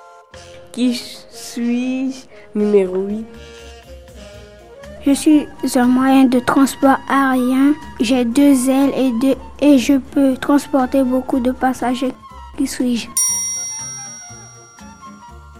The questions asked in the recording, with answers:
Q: Qui suis-je?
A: Un avion.